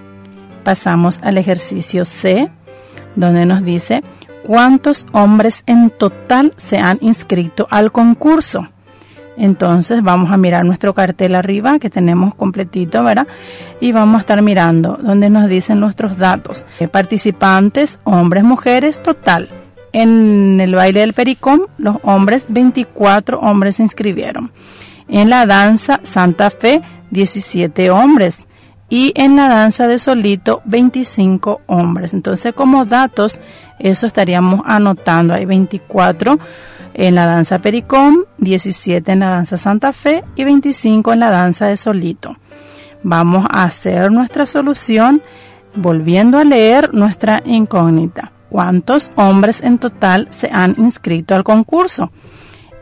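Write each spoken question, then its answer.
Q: ¿cuántos hombres en total se han inscrito al concurso?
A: 66 hombres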